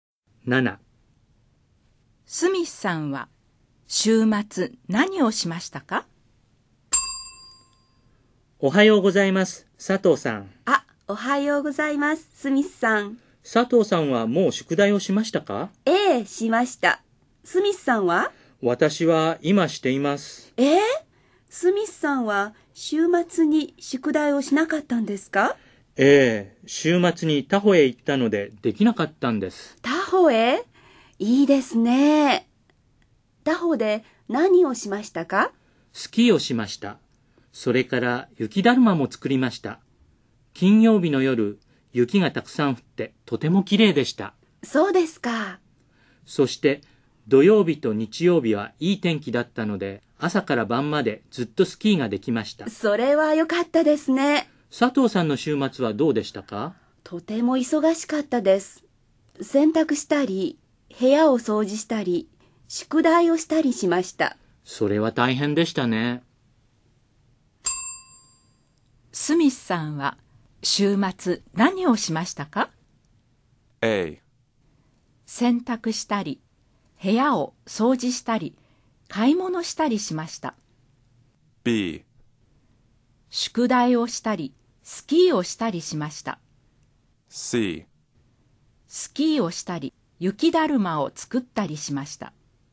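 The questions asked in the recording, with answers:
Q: スミスさんは週末何をしましたか?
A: C: スキーをしたり、雪だるまを作ったりしました。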